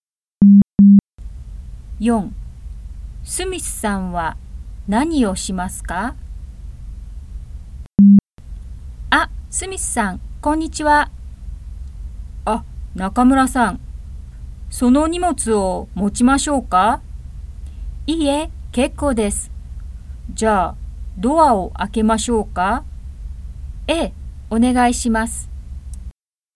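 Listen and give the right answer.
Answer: ドアを開けます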